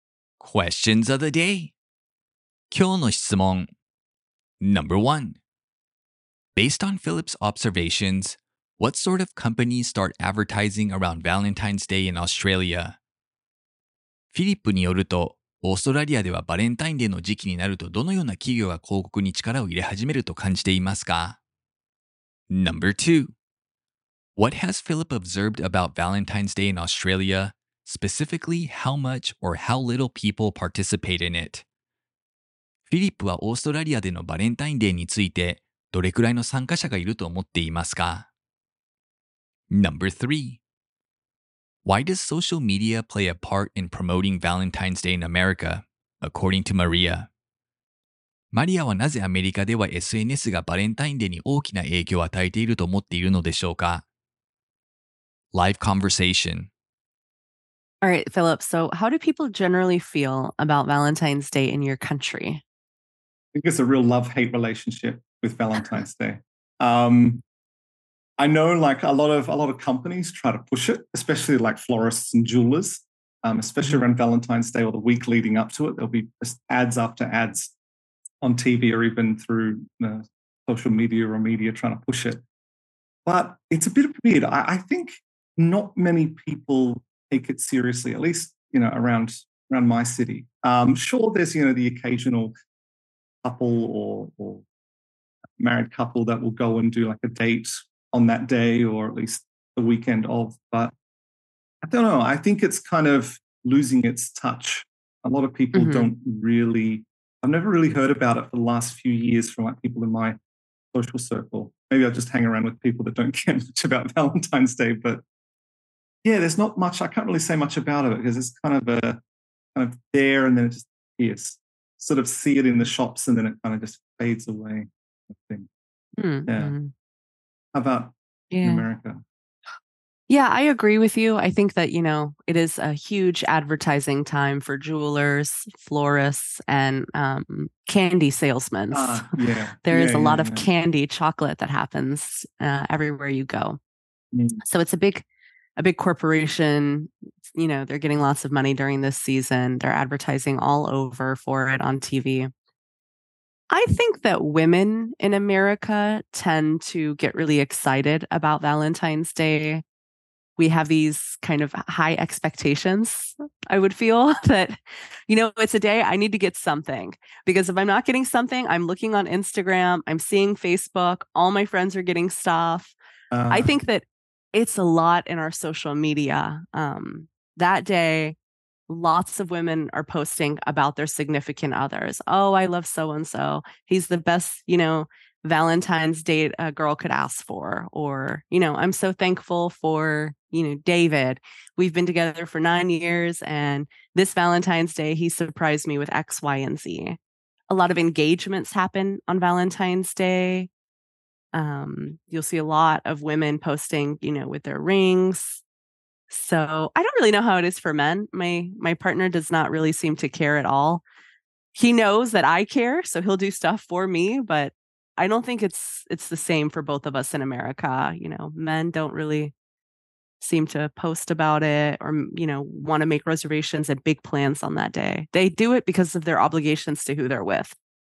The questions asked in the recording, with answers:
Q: Based on Philip's observations,What sort of companies start advertising around Valentine's Day in Australia?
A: Philip says that florists and jewelers often advertise around Valentine's Day in Australia.

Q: What has Philip observed about Valentine's Day in Australia?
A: Philip has observed that there aren't many couples that celebrate it openly, at least in the city he lives in.

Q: Why does social media play a part in promoting Valentine's Day in America, according to Maria?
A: Maria says that women tend to post on social media about their Valentine's Day gifts from their significant others.